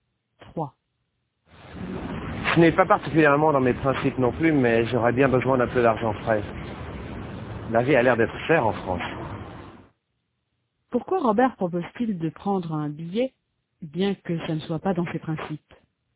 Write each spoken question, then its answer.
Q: Pourquoi Robert propose-t-il de prendre un billet, bien que ça ne soit pas dans ses principes?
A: Parce qu'il a besoin d'un peu d'argent frais.